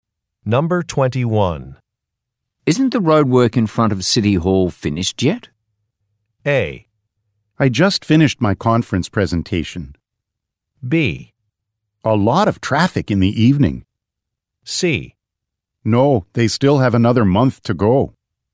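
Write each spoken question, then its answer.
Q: Isn't the roadwork in front of City Hall finished yet?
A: C: No, they still have another month to go.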